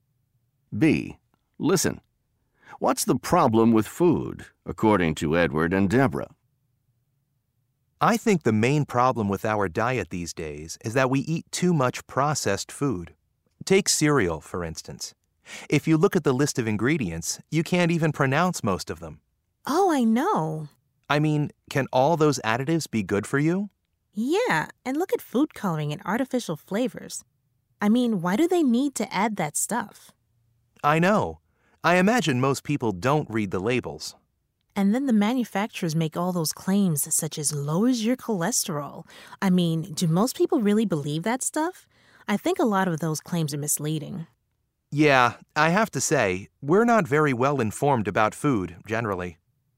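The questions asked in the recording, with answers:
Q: What's the problem with food, according to Edward and Deborah?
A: We eat too much processed food with additives and artificial ingredients, and people aren't well informed because they don't read labels and believe misleading claims.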